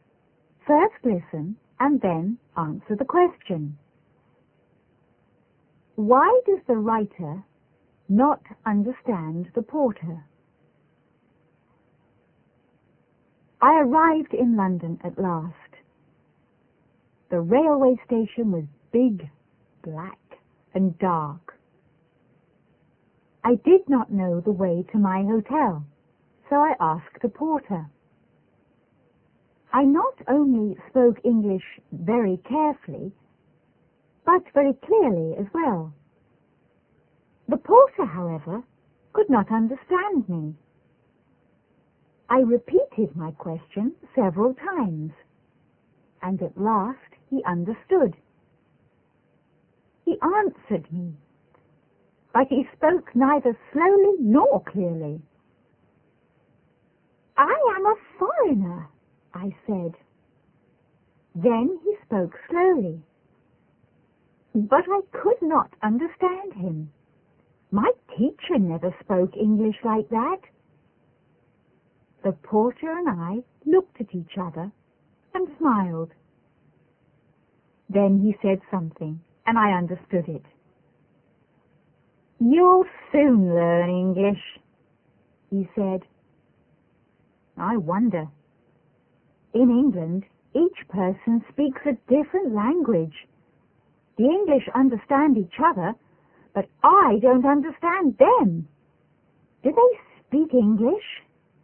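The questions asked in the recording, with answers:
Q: Why does the writer not understand the porter?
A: Because the porter spoke neither slowly nor clearly; in England each person speaks a different language.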